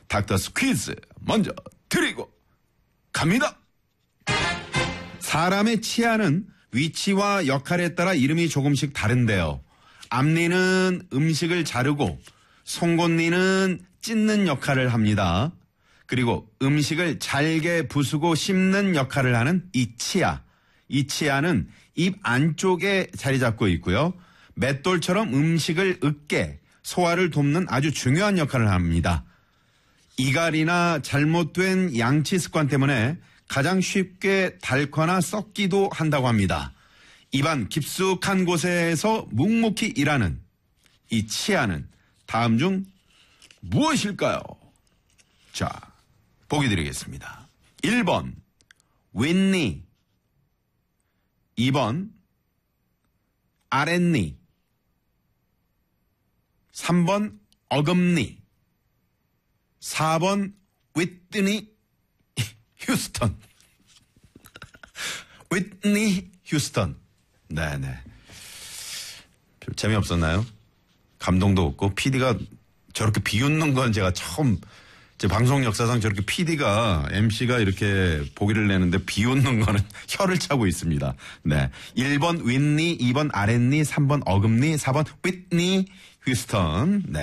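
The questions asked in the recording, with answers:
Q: 입안 깊숙한 곳에서 묵묵히 일하는 이 치아는 다음 중 무엇일까요?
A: 3: 어금니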